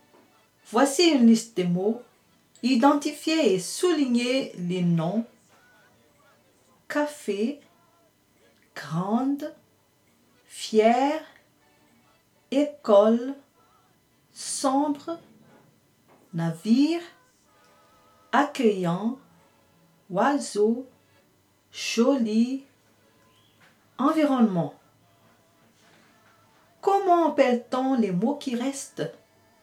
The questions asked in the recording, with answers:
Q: Comment appelle-t-on les mots qui restent?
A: Les mots qui restent s'appellent des adjectifs qualificatifs.